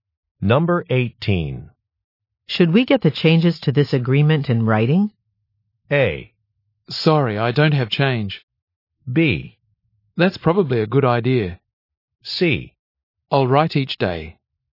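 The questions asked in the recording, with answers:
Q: Should we get the changes to this agreement in writing?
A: B: That's probably a good idea.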